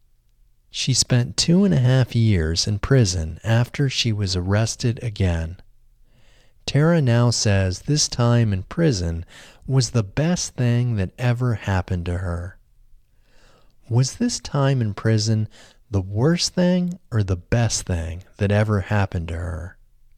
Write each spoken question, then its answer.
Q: Was this time in prison the worst thing or the best thing that ever happened to her?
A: This time in prison was the best thing that ever happened to her.